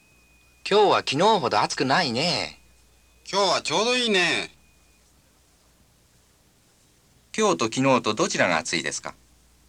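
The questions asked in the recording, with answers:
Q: 今日と昨日とどちらが暑いですか?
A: 昨日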